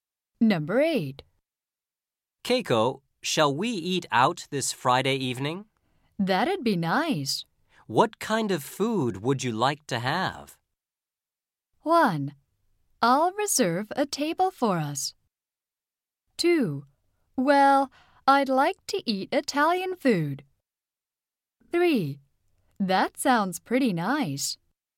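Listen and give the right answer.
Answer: 2: Well, I'd like to eat Italian food.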